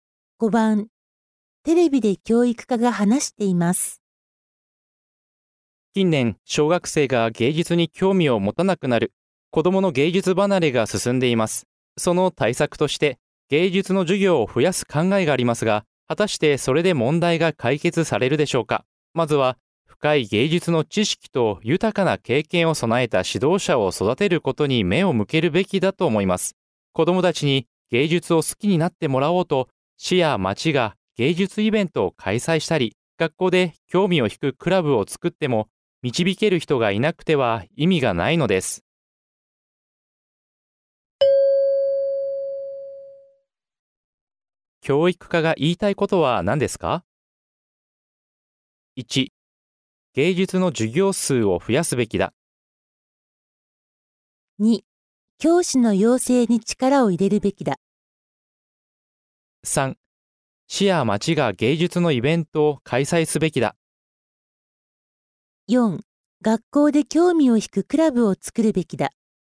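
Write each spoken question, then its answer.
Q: 教育家が言いたいことは何ですか ?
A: 2: 教師の養成に力を入れるべきだ。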